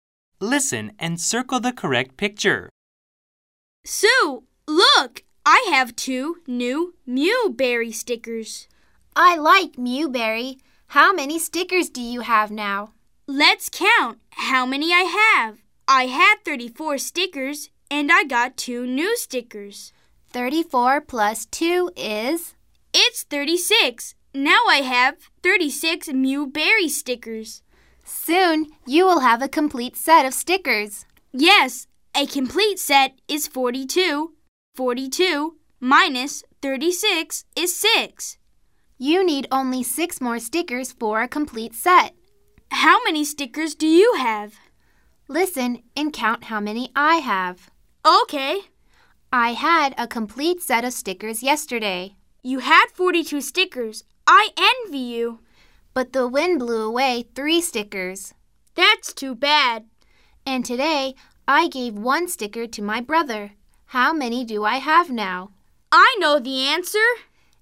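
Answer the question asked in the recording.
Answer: 38 stickers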